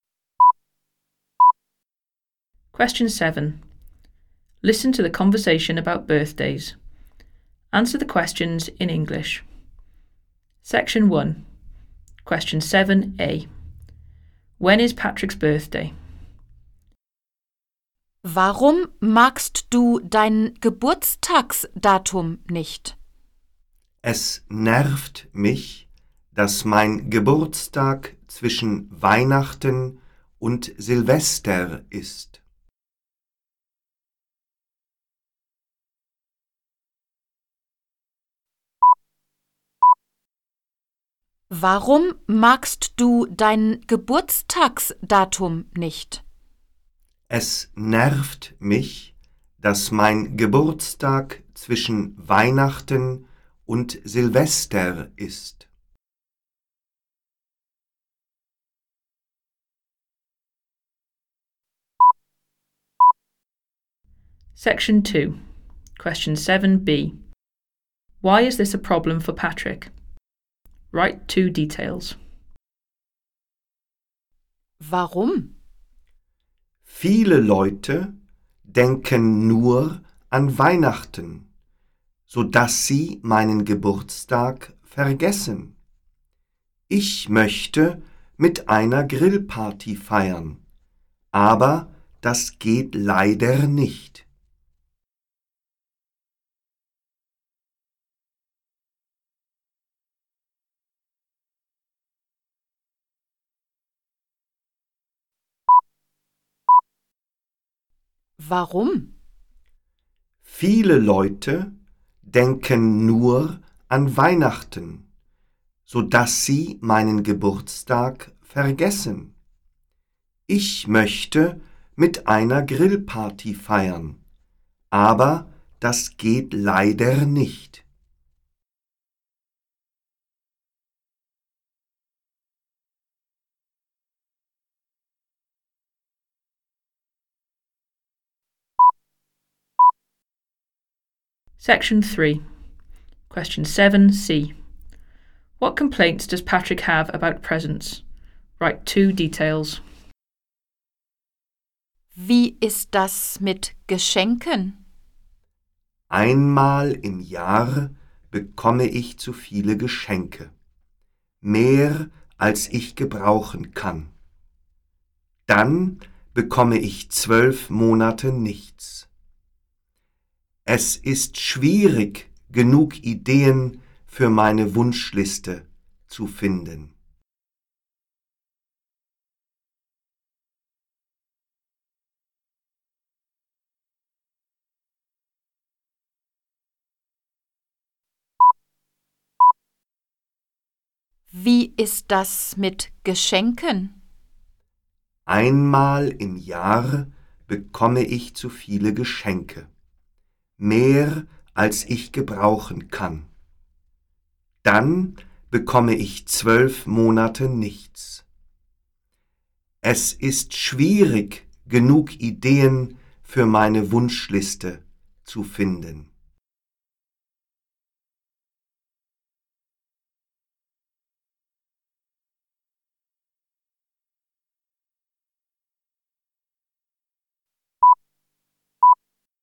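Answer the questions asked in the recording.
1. Between Christmas and New Year's Eve
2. People forget his birthday because they only think of Christmas; he can't have a barbecue party
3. He gets too many presents once a year then nothing for 12 months; hard to find ideas for his wish list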